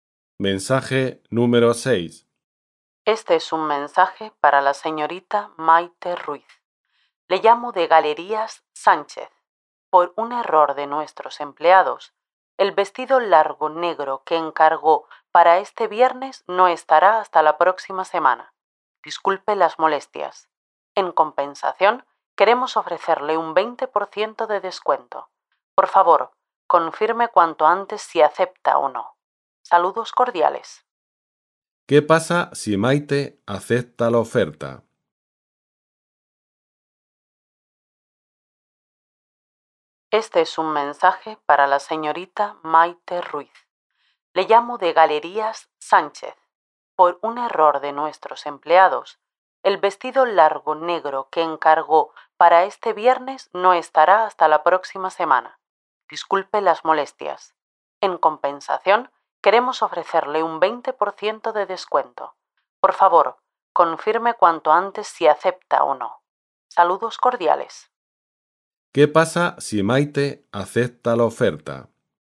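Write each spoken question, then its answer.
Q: ¿Qué pasa si Maite acepta la oferta?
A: Recibirá el vestido la próxima semana con un 20% de descuento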